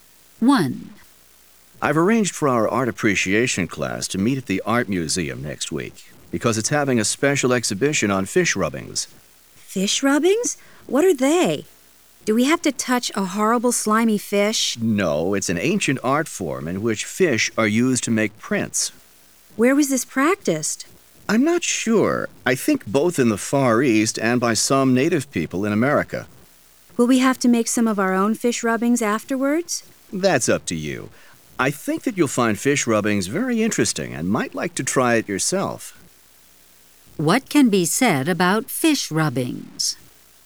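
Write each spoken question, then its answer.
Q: What can be said about fish rubbings?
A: They are an ancient art form in which fish are used to make prints.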